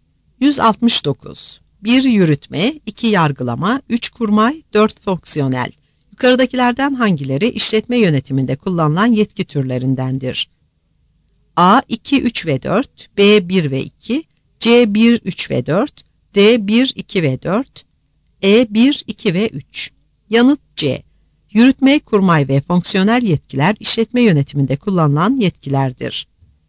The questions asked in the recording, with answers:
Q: Yukarıdakilerden hangileri işletme yönetiminde kullanılan yetki türlerindendir?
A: Yanıt C.